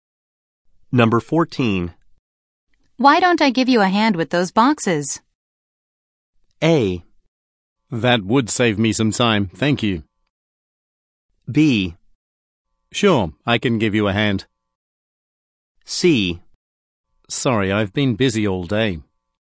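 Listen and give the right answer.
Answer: A: That would save me some time, thank you.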